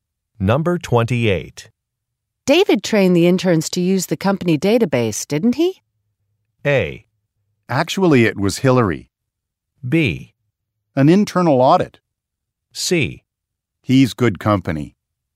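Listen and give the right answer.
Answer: A: Actually, it was Hillary.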